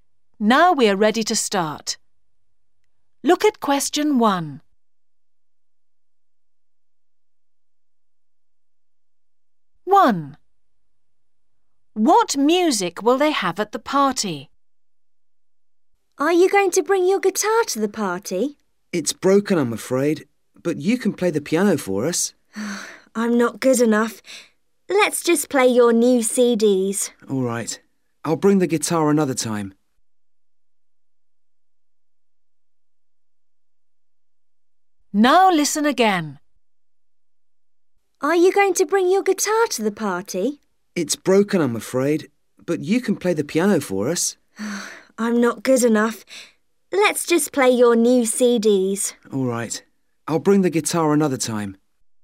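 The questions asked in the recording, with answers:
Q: What music will they have at the party?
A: new CDs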